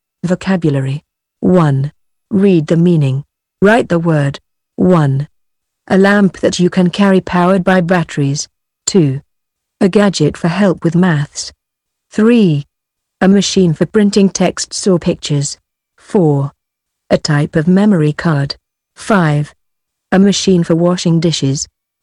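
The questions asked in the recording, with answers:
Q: A lamp that you can carry powered by batteries.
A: torch

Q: A gadget for help with maths.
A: calculator

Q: A machine for printing texts or pictures.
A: printer

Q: A machine for washing dishes.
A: dishwasher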